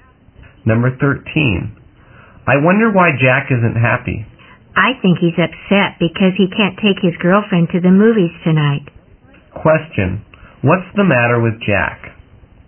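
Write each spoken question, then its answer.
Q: What's the matter with Jack?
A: He can't take his girlfriend to the movies tonight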